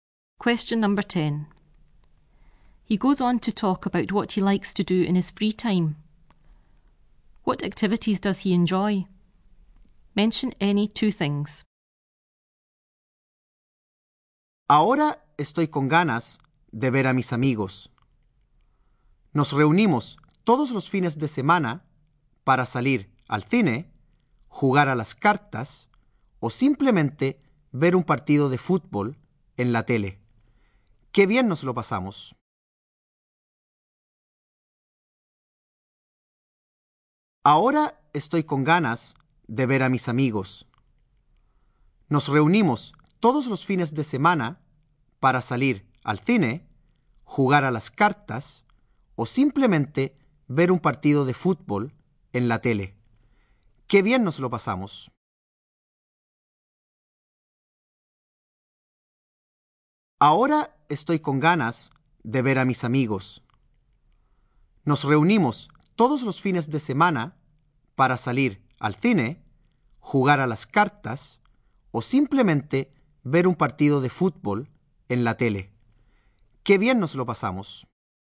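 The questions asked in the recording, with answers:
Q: What activities does he enjoy?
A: Any two of: going to the cinema, playing cards, watching a football match on TV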